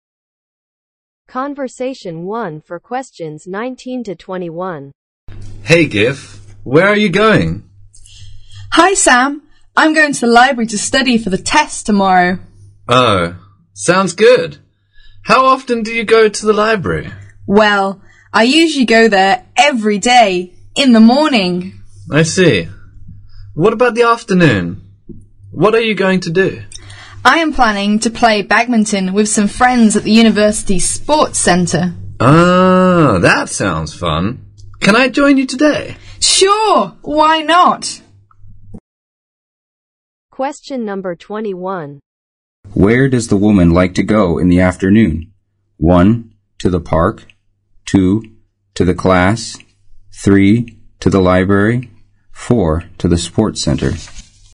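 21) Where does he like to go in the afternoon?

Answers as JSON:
{"21": "To the sports center"}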